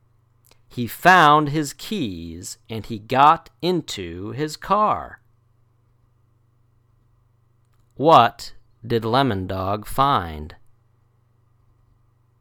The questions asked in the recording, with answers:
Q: What did Lemon Dog find?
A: His keys.